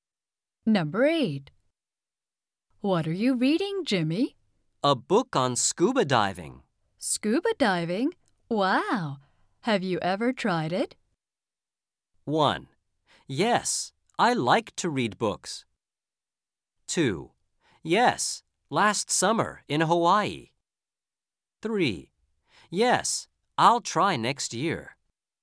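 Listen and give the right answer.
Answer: 2: Yes, last summer in Hawaii.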